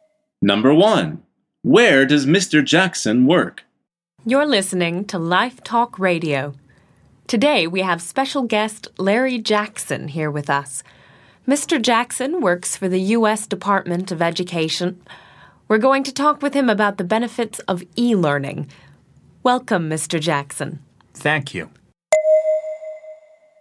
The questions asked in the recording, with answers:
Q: Where does Mr. Jackson work?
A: The answer is the U.S. Department of Education.